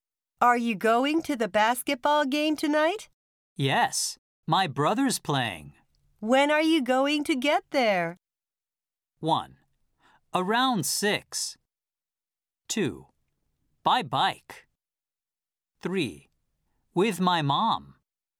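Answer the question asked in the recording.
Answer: 1: Around 6.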